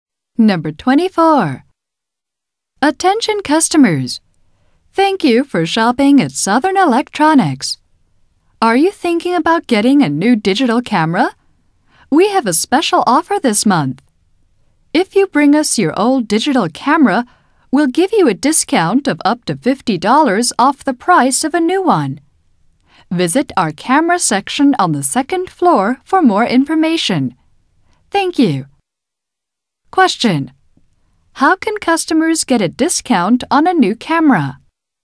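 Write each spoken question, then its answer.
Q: How can customers get a discount on a new camera?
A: By bringing in their old digital camera.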